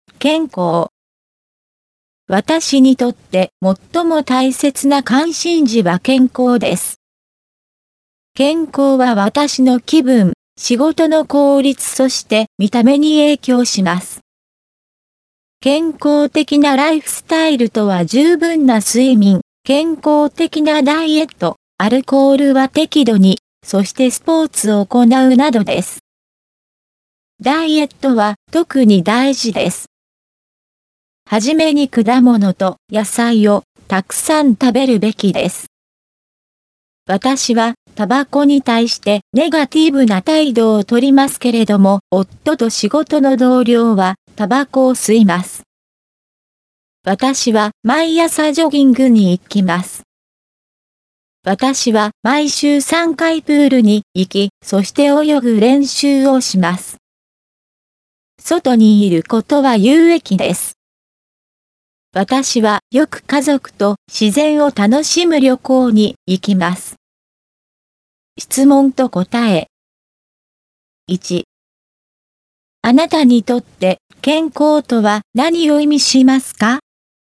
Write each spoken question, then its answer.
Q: あなたにとって健康とは何を意味しますか?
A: 健康は私にとって気分、見た目と仕事の効率を意味します。